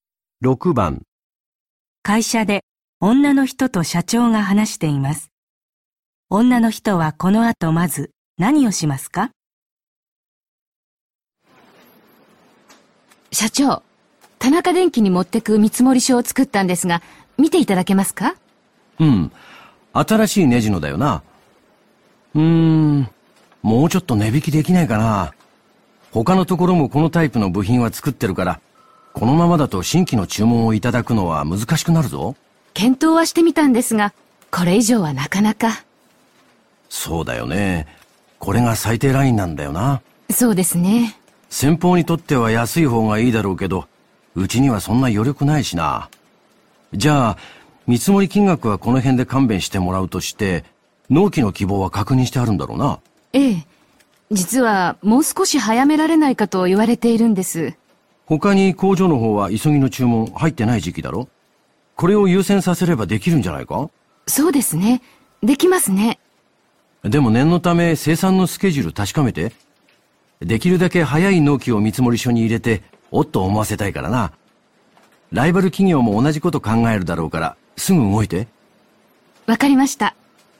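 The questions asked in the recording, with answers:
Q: 女の人はこの後まず何をしますか?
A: 生産のスケジュールを確かめる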